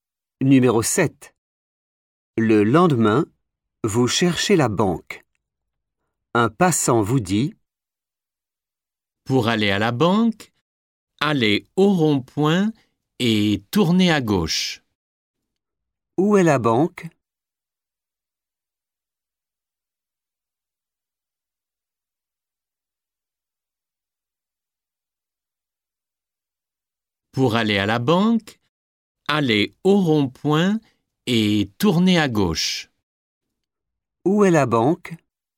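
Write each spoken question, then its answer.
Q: Où est la banque?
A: au rond-point, à gauche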